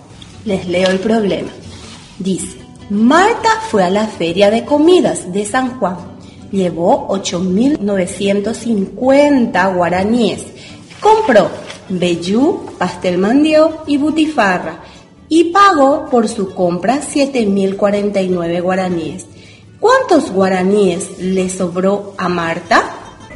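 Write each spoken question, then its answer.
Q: ¿Cuántos guaraníes le sobró a Marta?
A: 1.901 guaraníes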